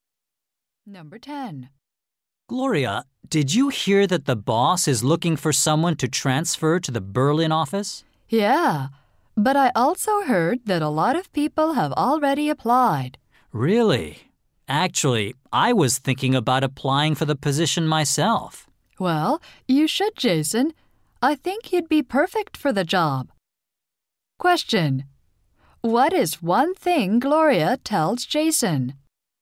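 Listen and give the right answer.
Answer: He would be perfect for the Berlin job.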